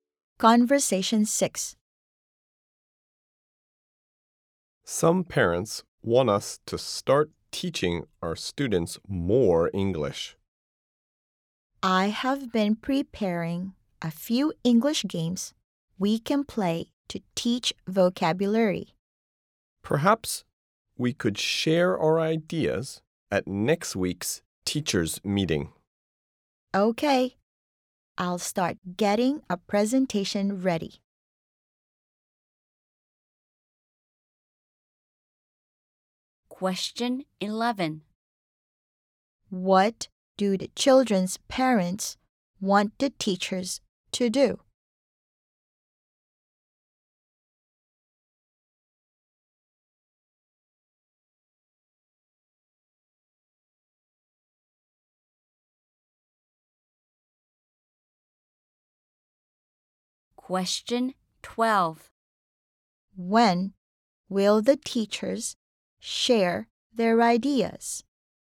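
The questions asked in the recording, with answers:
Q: What do the children's parents want the teachers to do?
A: Teach the students more English

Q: When will the teachers share their ideas?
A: At next week's teachers' meeting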